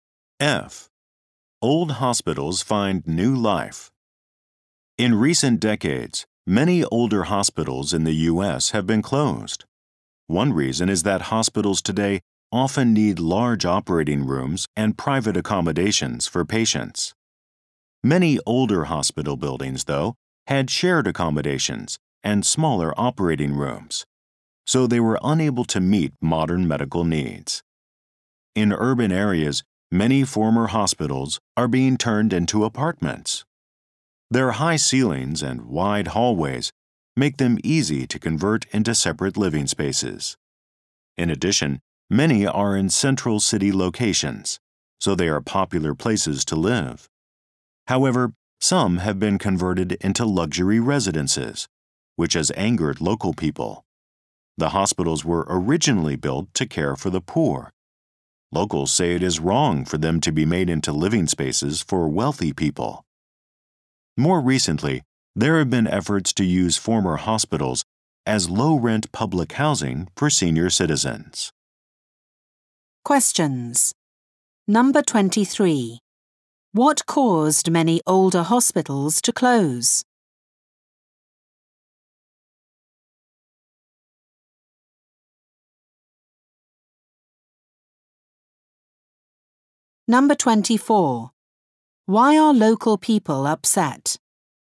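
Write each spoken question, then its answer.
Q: What caused many older hospitals to close?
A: They could not meet modern medical needs, such as large operating rooms and private rooms for patients.

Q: Why are local people upset?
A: Some hospitals built to care for the poor were turned into luxury homes for wealthy people.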